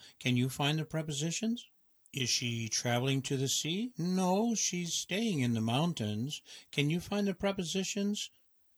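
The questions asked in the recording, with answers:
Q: Can you find the prepositions?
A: to, in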